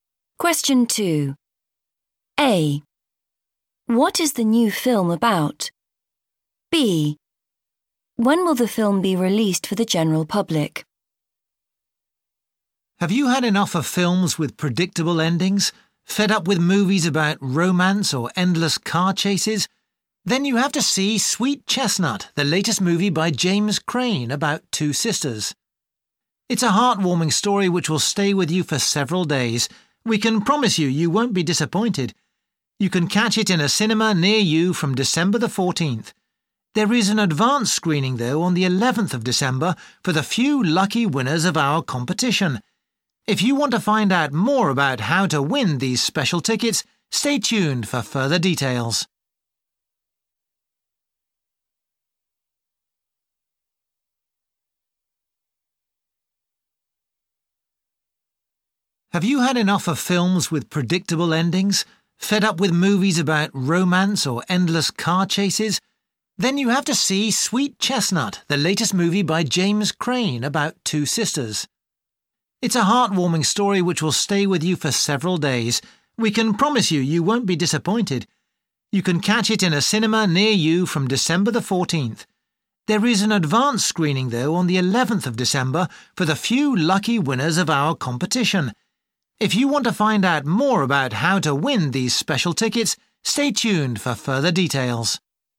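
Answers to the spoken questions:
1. Two sisters
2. December the 14th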